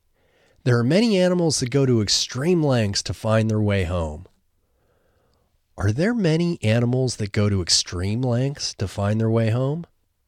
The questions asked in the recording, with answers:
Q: Are there many animals that go to extreme lengths to find their way home?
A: Yes, there are many animals that go to extreme lengths to find their way home.